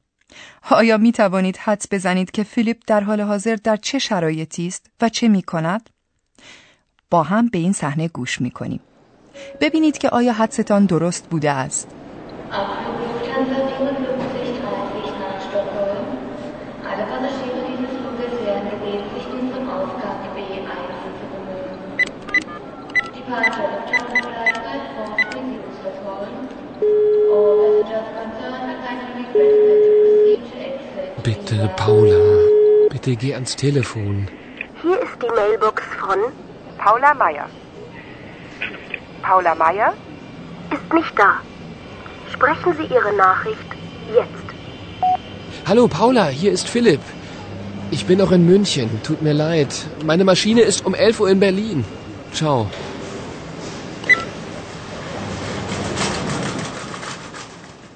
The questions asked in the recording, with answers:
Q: آیا می توانید حدس بزنید که فیلیپ در حال حاضر در چه شرایطی است و چه می کند؟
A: حتی اگر شما تک تک جملات را هم به طور دقیق نفهمیده باشید، شاید متوجه شدید که فیلیپ سعی دارد به پاولا زنگ زده و خبر تأخیر خود را به اطلاع او برساند.